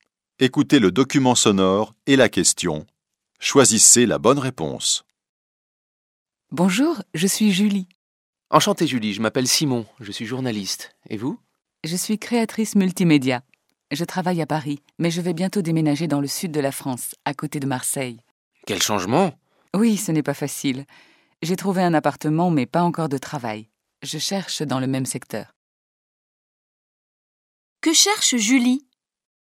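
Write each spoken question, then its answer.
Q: Que cherche Julie ?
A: Un travail de créatrice multimédia (dans le même secteur)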